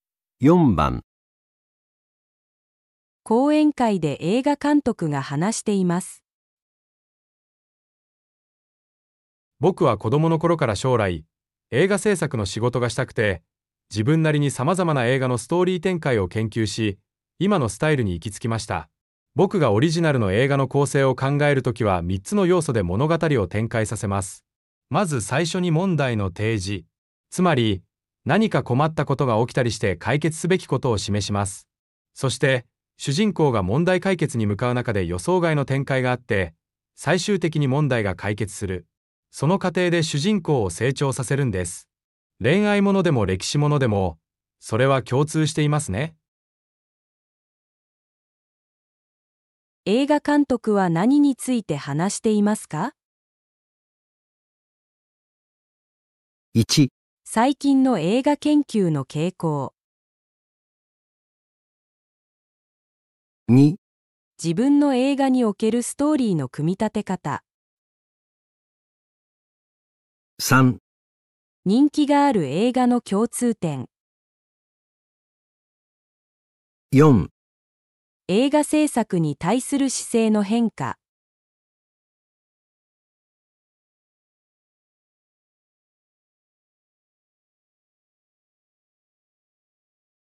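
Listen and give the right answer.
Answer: 2: 自分の映画におけるストーリーの組み立て方。

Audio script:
講演会で映画監督が話しています。
男:僕は子供のころから将来、映画製作の仕事がしたくて自分なりに様々な映画のストーリー展開を研究し、今のスタイルに行きつきました。僕がオリジナルの映画の構成を考える時は3つの要素で物語を展開させます。まず最初に問題の提示。つまり、何か困ったことが起きたりして解決すべきことを示します。そして主人公が問題解決に向かう中で予想外の展開があって、最終的に問題が解決する。その過程で主人公を成長させるんです。恋愛ものでも歴史ものでもそれは共通していますね。
1.最近の映画研究の傾向
2.自分の映画におけるストーリーの組み立て方
3.人気がある映画の共通点
4.映画製作に対する姿勢の変化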